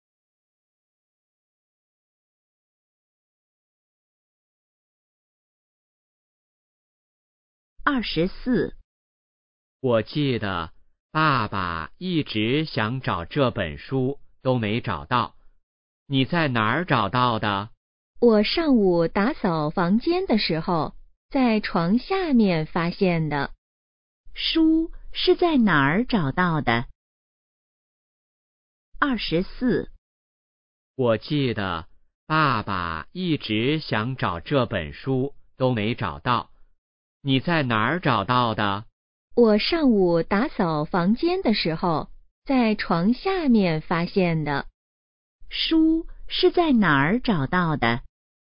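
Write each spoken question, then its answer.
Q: 书是在哪儿找到的?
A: 床下面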